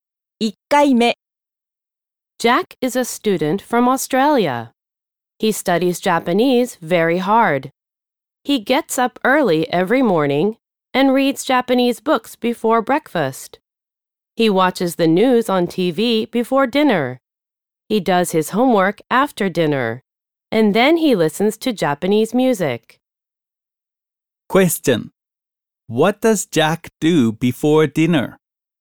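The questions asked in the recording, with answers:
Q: What does Jack do before dinner?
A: He watches the news on TV.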